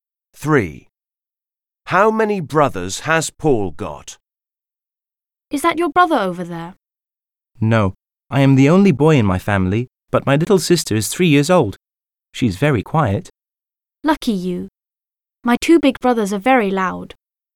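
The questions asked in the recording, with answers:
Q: How many brothers has Paul got?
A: none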